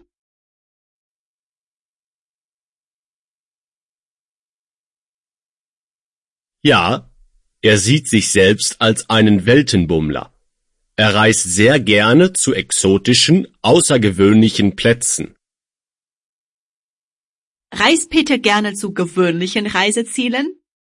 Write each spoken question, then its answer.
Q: Reist Peter gerne zu gewöhnlichen Reisezielen?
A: Überhaupt nicht. Er reist nicht zu gewöhnlichen Reisezielen.